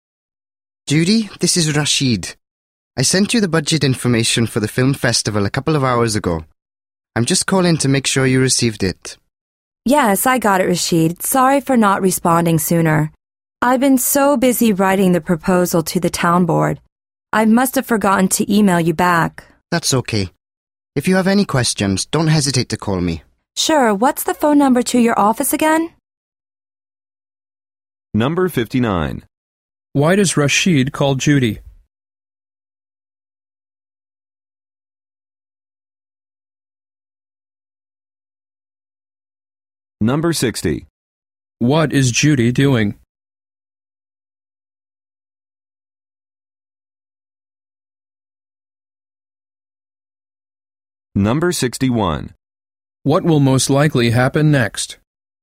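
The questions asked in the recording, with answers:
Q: Why does Rashid call Judy?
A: To make sure she received the budget information he sent

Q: What is Judy doing?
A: Writing a proposal to the town board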